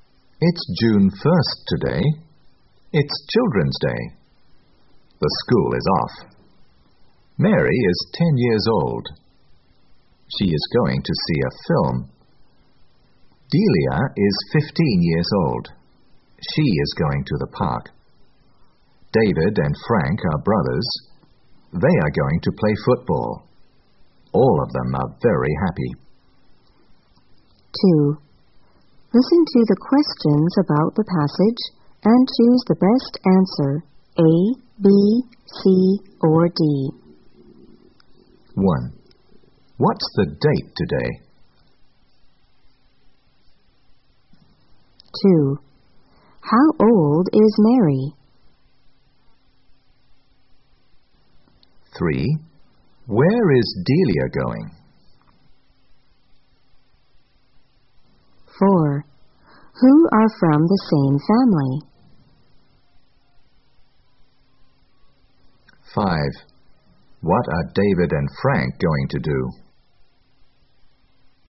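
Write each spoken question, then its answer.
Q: What's the date today?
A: June 1st

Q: How old is Mary?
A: 10 years old

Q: Where is Delia going?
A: To the park

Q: Who are from the same family?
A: David and Frank

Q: What are David and Frank going to do?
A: Play football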